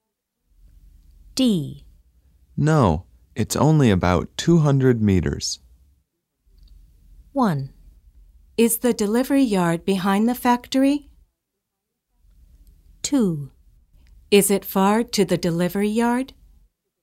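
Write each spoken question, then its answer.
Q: No, it's only about 200 meters.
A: 2: Is it far to the delivery yard?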